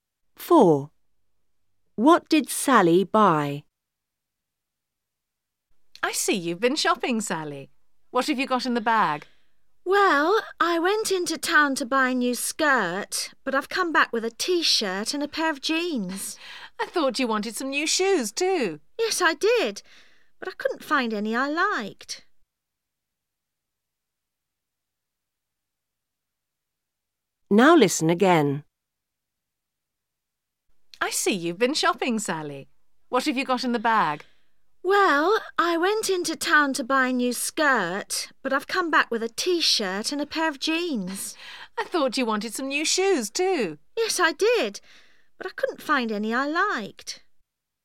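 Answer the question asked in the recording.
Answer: A T-shirt and a pair of jeans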